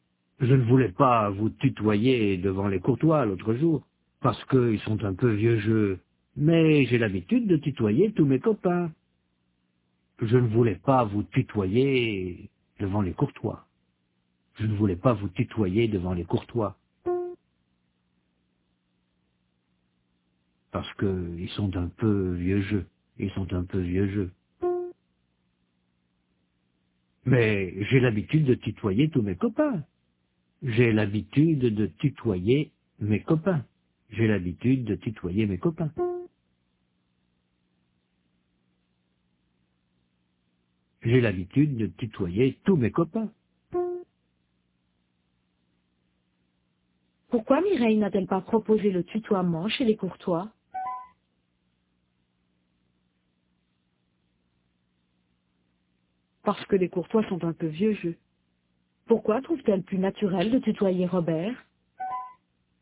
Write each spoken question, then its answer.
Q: Pourquoi trouve-t-elle plus naturel de tutoyer Robert ?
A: Parce qu'elle tutoie tous ses copains.